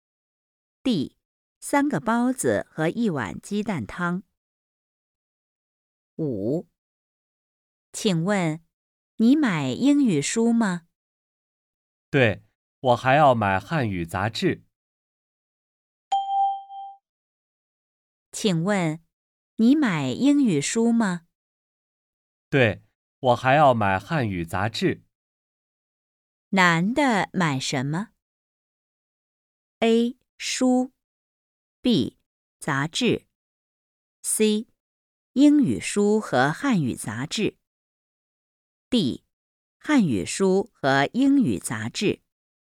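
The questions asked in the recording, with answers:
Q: 男的买什么?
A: C: 英语书和汉语杂志。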